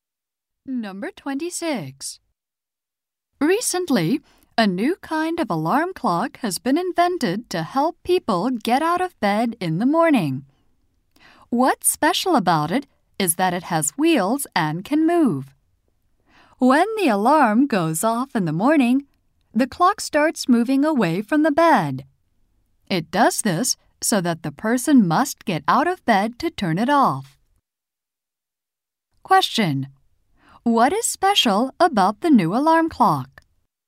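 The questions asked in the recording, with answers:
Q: What is special about the new alarm clock?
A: It has wheels and moves away from the bed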